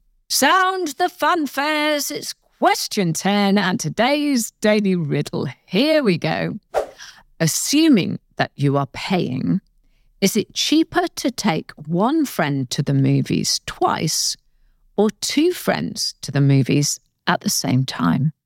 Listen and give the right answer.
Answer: It's cheaper to take two friends at the same time.